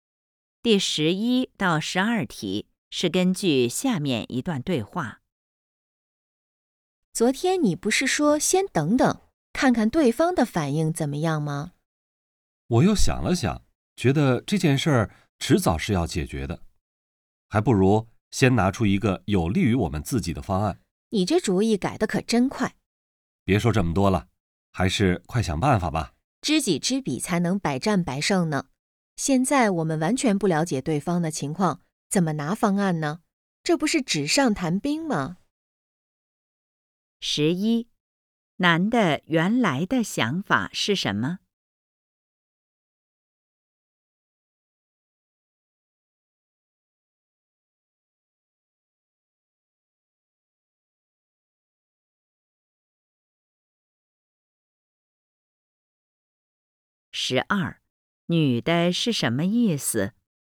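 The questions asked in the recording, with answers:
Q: 男的原来的想法是什么?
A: 先等等,看看对方的反应

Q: 女的是什么意思?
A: 不了解对方情况,现在拿方案是纸上谈兵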